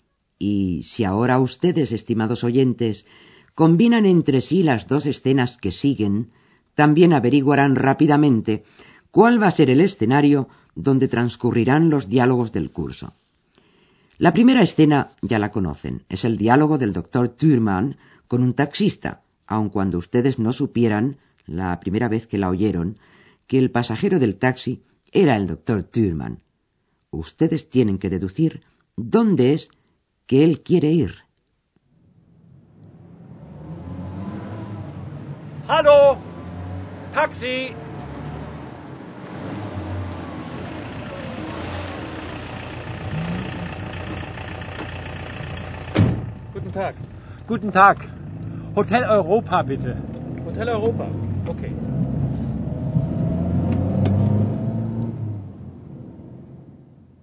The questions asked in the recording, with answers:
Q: Ustedes tienen que deducir dónde es que él quiere ir.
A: Así pues, el doctor Thürmann desea que el taxista le lleve al Hotel Europa.